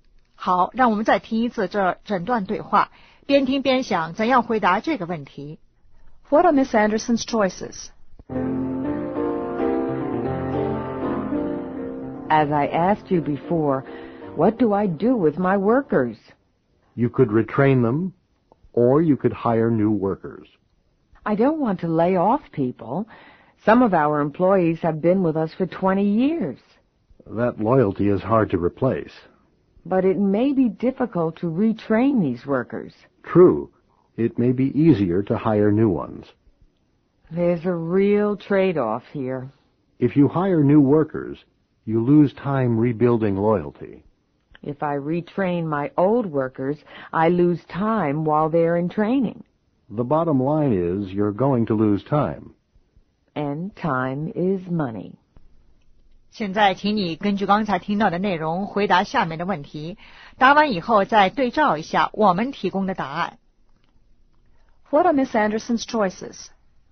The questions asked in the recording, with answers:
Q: What are Miss Anderson's choices?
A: Retrain the workers or hire new workers.